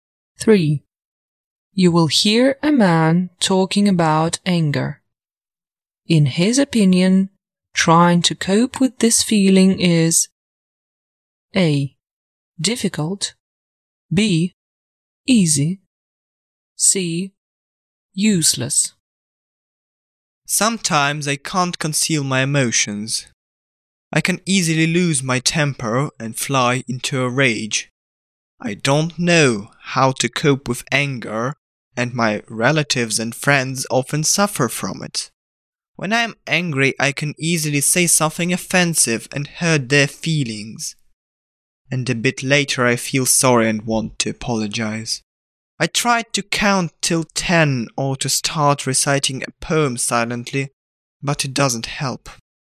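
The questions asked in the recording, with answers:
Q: In his opinion, trying to cope with this feeling is A.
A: A: Difficult.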